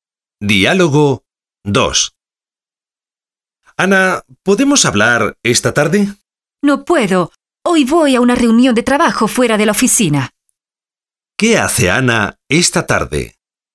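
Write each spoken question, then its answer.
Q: ¿Qué hace Ana esta tarde?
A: Va a una reunión de trabajo fuera de la oficina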